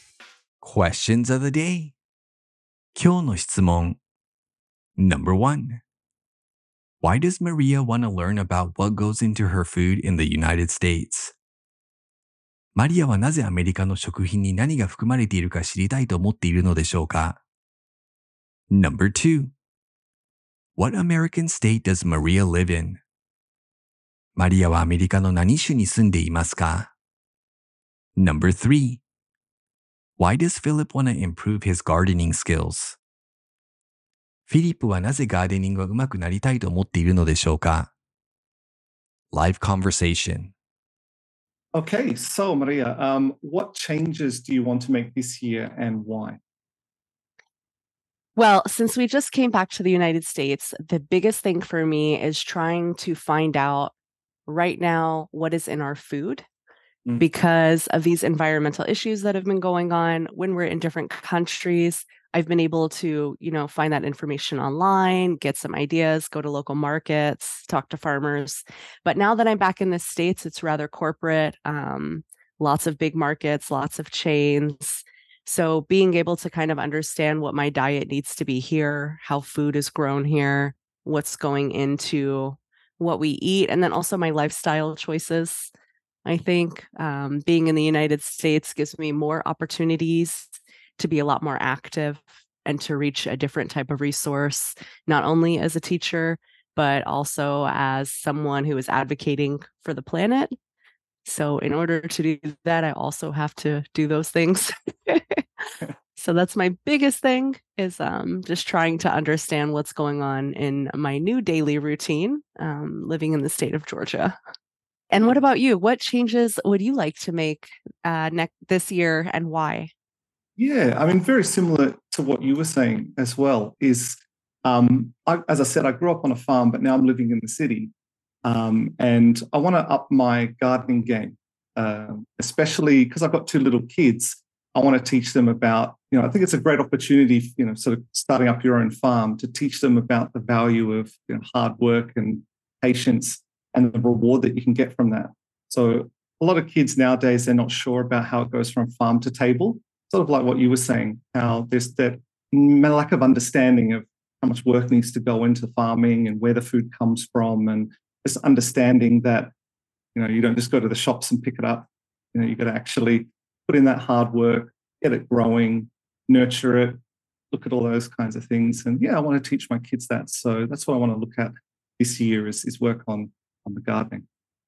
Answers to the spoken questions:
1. She's concerned about environmental issues and wants to base her diet around those concerns.
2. She lives in the state of Georgia.
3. He wants to teach his kids about the process of growing food so they understand the hard work that goes into it.